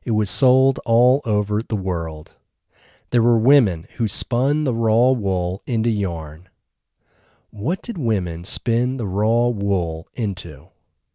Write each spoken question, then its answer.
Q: What did women spin the raw wool into?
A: Women spun the raw wool into yarn.